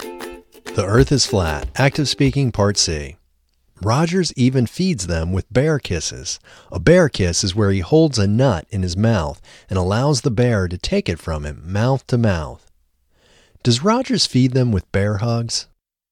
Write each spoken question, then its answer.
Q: Does Rogers feed them with bear hugs?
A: No, Rogers doesn't feed them with bear hugs.